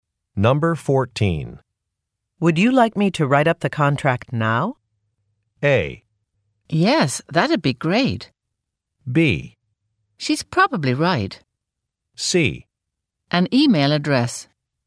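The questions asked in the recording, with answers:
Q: Would you like me to write up the contract now?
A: A: Yes, that'd be great.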